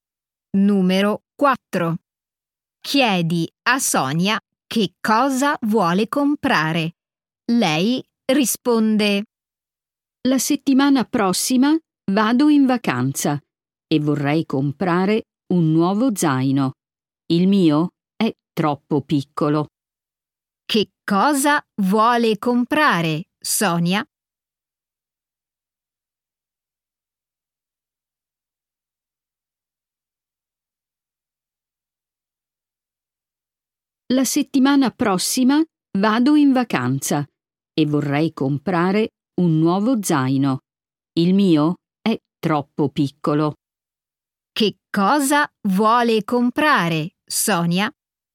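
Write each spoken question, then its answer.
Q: Che cosa vuole comprare, Sonia?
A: un nuovo zaino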